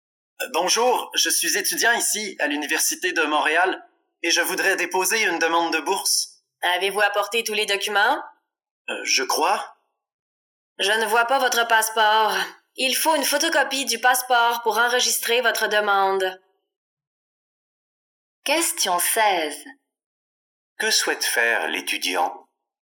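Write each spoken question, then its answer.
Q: Que souhaite faire l'étudiant?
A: Déposer une demande de bourse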